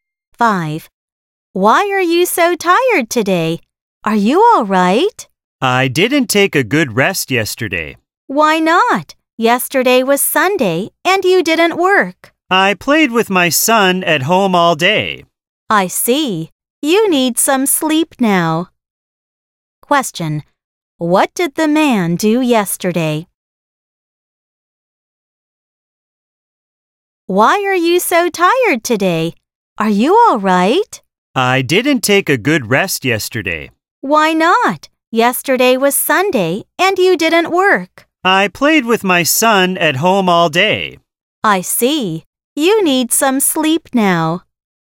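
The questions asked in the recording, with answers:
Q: Question, what did the man do yesterday?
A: He played with his son at home all day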